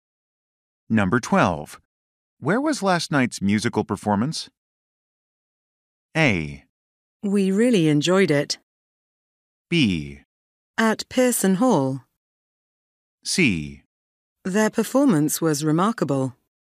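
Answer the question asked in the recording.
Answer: B: At Pearson Hall.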